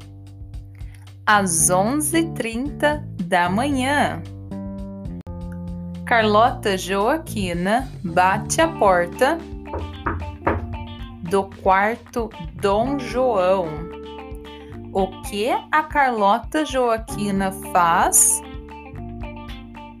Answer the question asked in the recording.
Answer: Bate a porta do quarto Dom João.